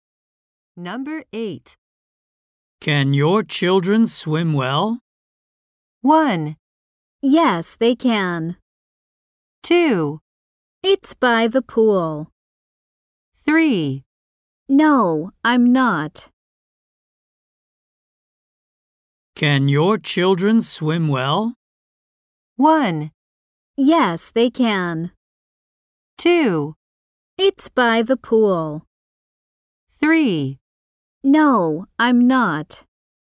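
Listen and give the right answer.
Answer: 1: Yes, they can.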